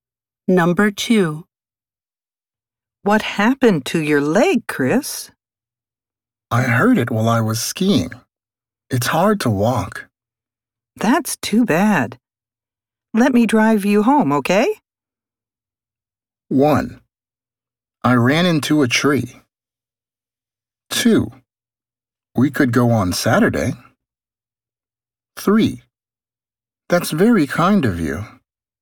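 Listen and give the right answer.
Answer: 3: That's very kind of you.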